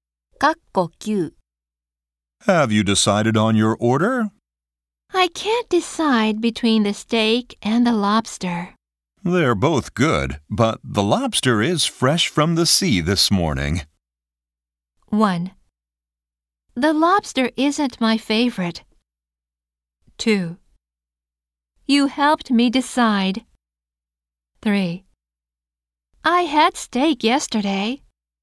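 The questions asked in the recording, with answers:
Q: They're both good, but the lobster is fresh from the sea this morning.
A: 2: You helped me decide.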